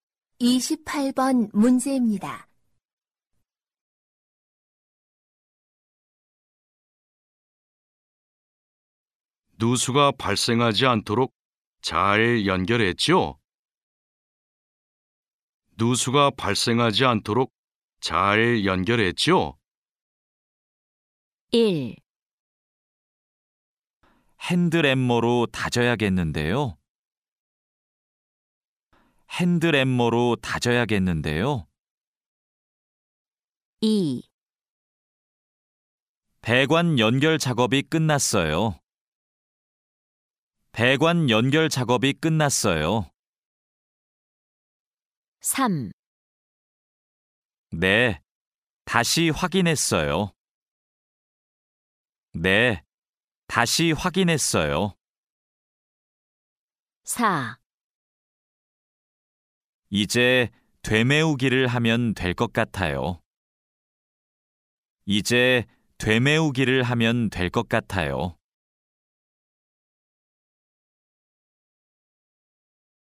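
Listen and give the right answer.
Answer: 3: 네, 다시 확인했어요.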